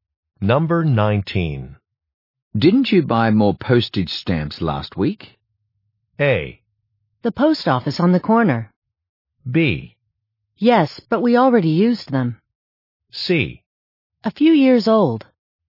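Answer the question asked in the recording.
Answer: B: Yes, but we already used them.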